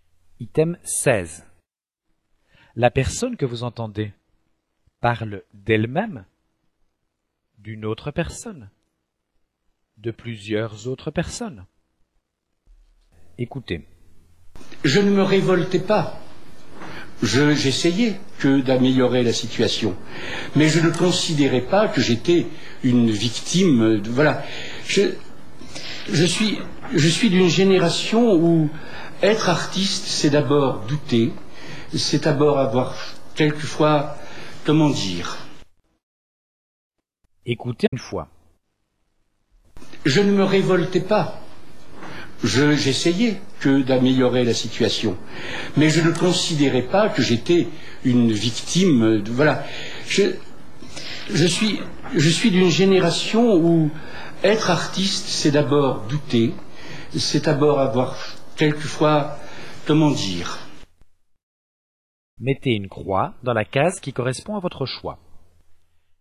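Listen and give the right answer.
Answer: d'elle-même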